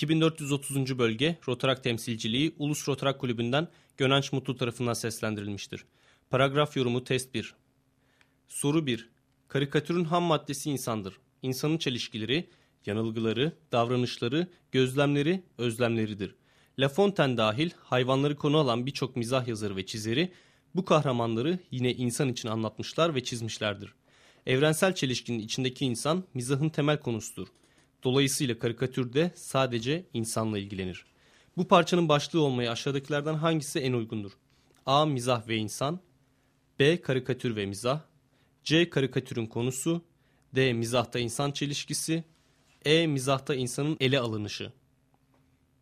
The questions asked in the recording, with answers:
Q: Bu parçanın başlığı olmaya aşağıdakilerden hangisi en uygundur?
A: Doğru cevap C şıkkı.